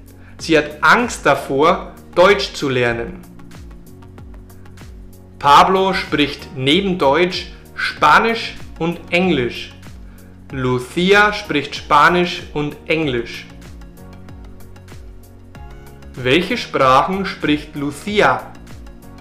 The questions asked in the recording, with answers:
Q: Welche Sprachen spricht Lucia?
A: Spanisch und Englisch.